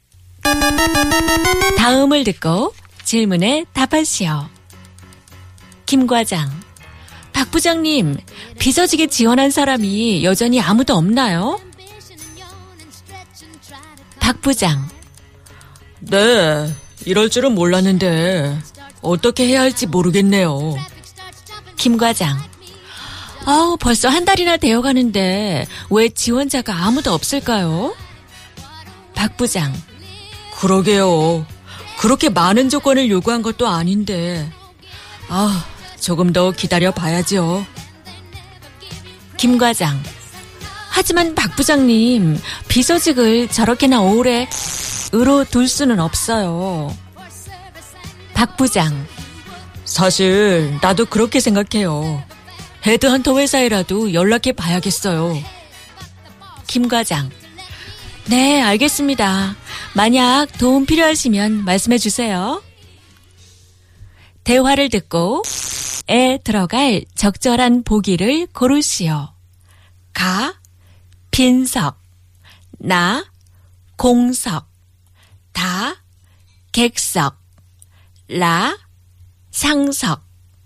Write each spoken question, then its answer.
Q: 대화를 듣고에 들어갈 적절한 보기를 고르시오.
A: It was na, kongsok, vacancy.